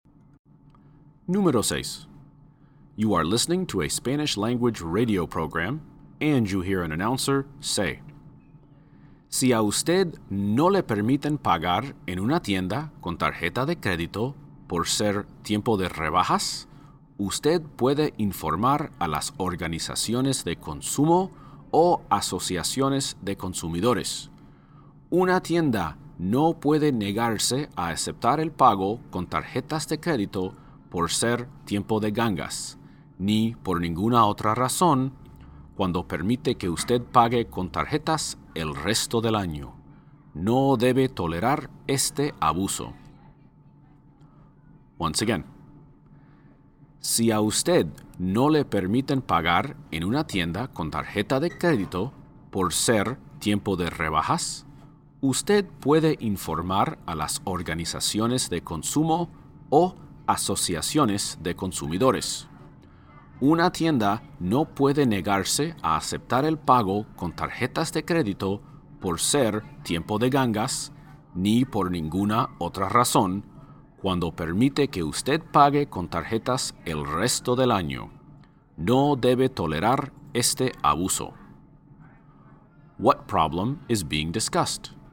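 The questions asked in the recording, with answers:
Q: What problem is being discussed?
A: Stores refusing credit card payment during sales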